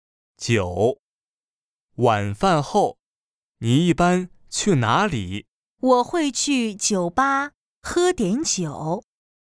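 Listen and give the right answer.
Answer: 酒吧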